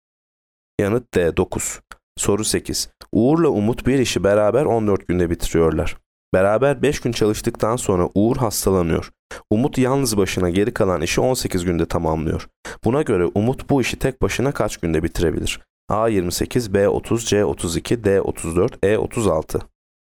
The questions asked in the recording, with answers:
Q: Buna göre Umut bu işi tek başına kaç günde bitirebilir?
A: Yanıt A 28.